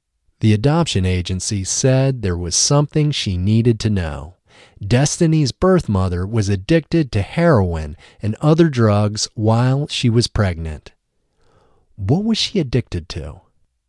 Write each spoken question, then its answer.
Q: What was she addicted to?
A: She was addicted to heroin and other drugs.